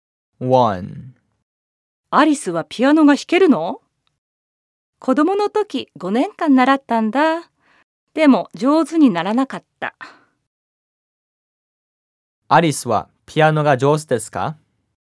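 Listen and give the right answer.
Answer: いいえ、上手じゃありません。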